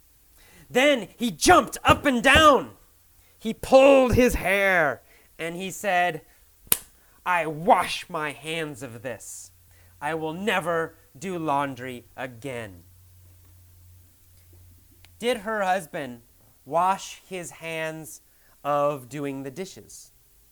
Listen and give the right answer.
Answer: No. He didn't decide never to do the dishes.